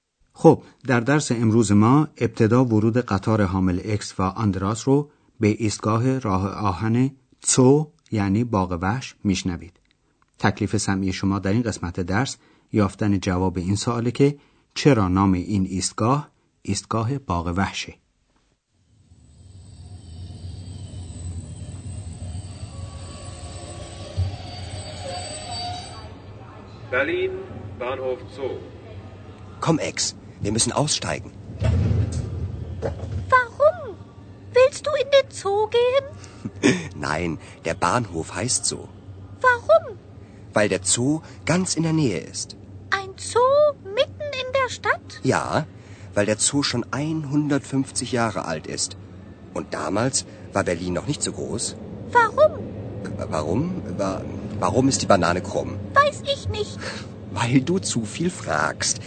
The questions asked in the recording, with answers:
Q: چرا نام این ایستگاه ایستگاه باغ وحشه؟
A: پس فهمیدیم که علت این نامگذاری اینه که این ایستگاه در مجاورت باغ وحش برلن